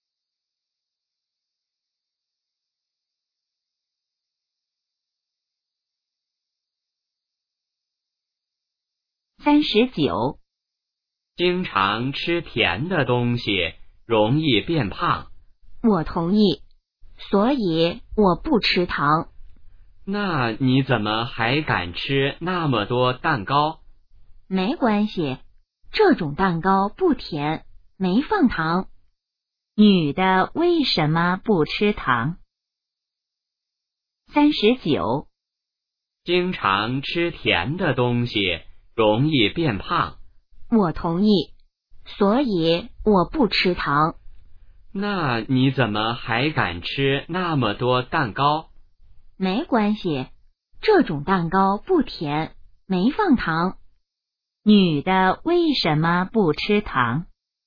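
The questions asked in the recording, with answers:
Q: 女的为什么不吃糖?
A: 吃甜的东西容易变胖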